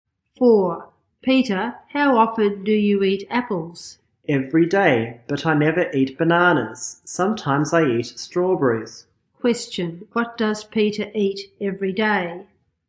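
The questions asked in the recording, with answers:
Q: What does Peter eat every day?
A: Apples.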